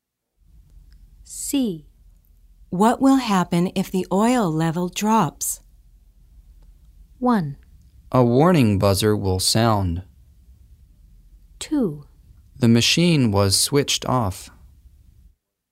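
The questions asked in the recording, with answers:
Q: What will happen if the oil level drops?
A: 1: A warning buzzer will sound.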